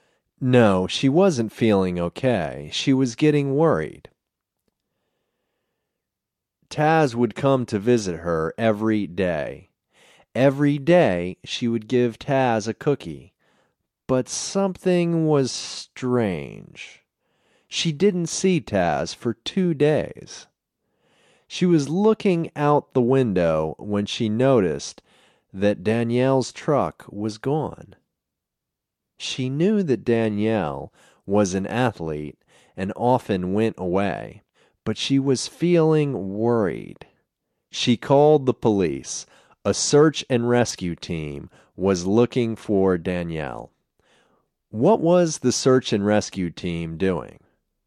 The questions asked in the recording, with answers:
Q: What was the search and rescue team doing?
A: The search and rescue team was looking for Danielle.